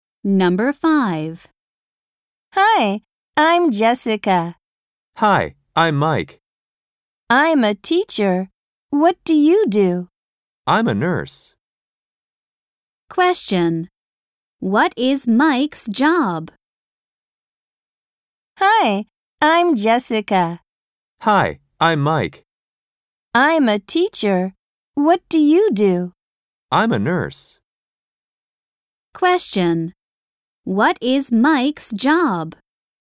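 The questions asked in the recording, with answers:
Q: What is Mike's job?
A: a nurse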